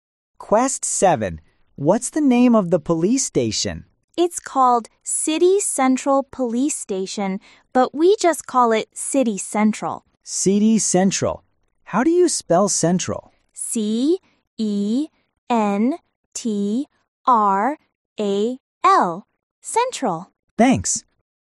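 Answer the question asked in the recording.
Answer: City Central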